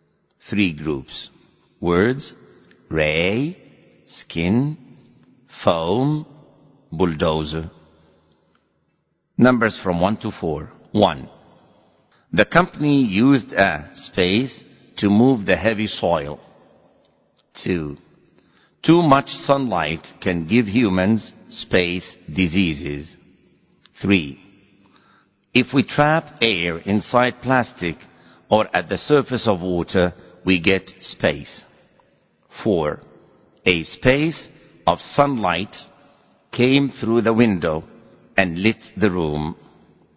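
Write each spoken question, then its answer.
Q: 1. The company used a space to move the heavy soil.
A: bulldozer

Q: 2. Too much sunlight can give humans space diseases.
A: skin

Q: 3. If we trap air inside plastic or at the surface of water, we get space.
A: foam

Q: 4. A space of sunlight came through the window and lit the room.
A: ray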